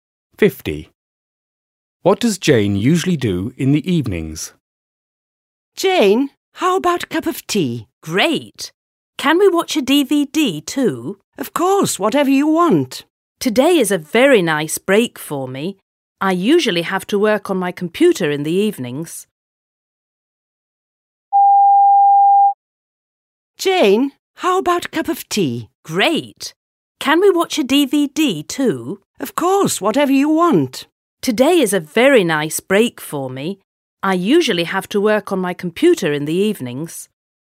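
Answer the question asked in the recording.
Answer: Works on her computer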